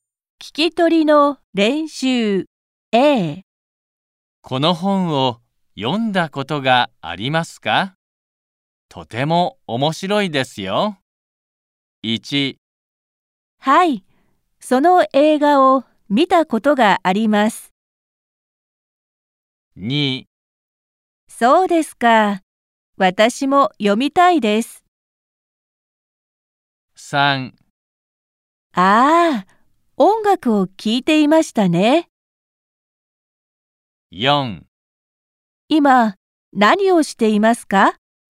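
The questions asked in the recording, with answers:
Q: この本を読んだことがありますか?とても面白いですよ。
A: 2: そうですか、私も読みたいです。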